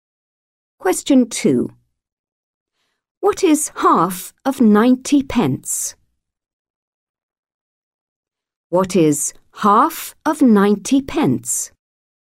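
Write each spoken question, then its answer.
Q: What is half of 90 pence?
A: 45 pence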